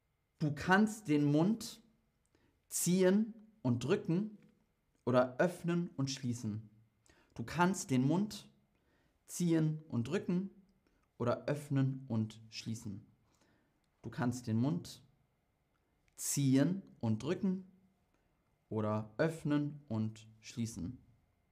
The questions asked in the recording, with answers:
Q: Du kannst den Mund ziehen und drücken oder öffnen und schließen.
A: Du kannst den Mund öffnen und schließen.